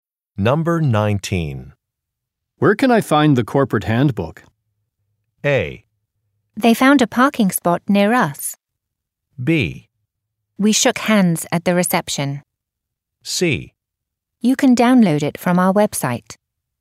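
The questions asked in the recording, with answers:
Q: Where can I find the corporate handbook?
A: C: You can download it from our website.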